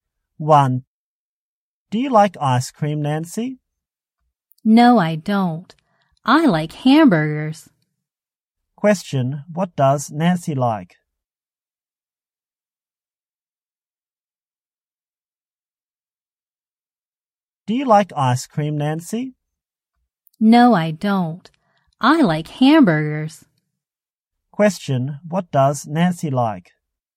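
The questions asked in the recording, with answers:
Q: what does Nancy like?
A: Hamburgers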